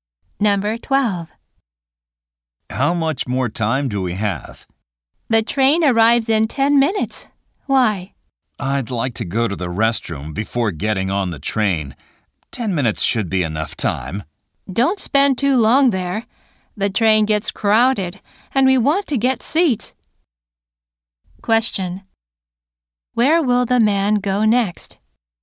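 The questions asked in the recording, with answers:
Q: Where will the man go next?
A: To the restroom.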